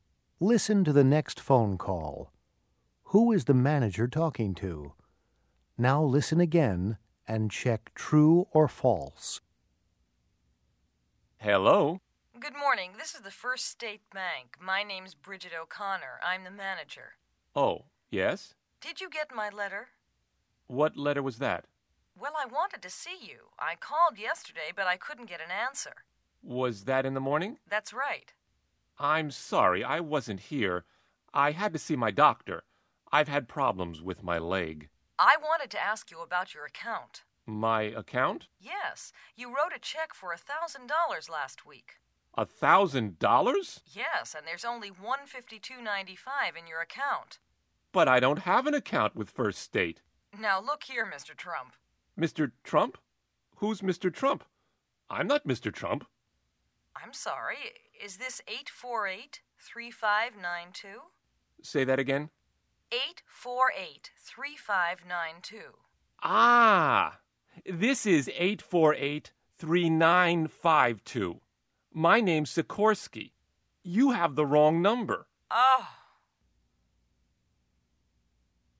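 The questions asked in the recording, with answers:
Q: Who is the manager talking to?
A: A man called Sikorsky, not her customer Mr. Trump. She called the wrong number.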